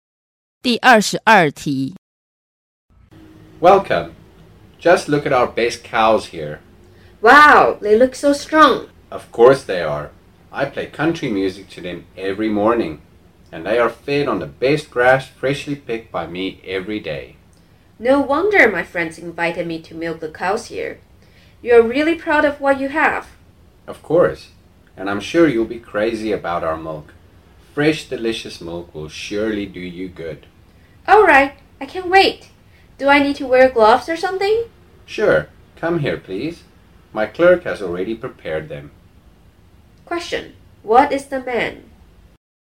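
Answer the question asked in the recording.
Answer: A farmer (dairy farm owner).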